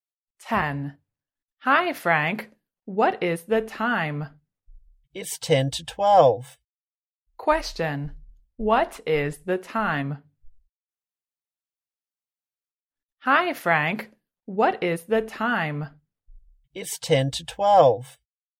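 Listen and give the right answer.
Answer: 10 to 12 (11:50)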